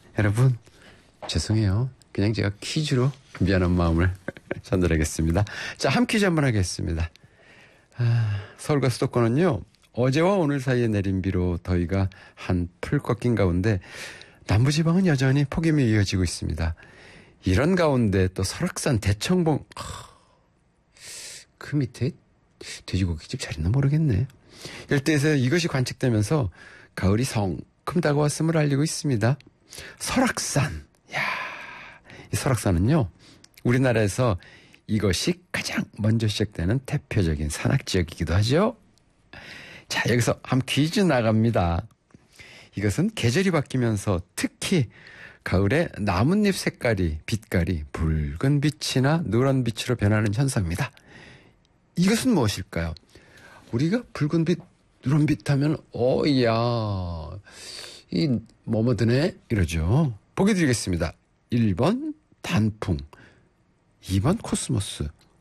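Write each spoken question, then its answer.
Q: 이것은 무엇일까요?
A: 1번: 단풍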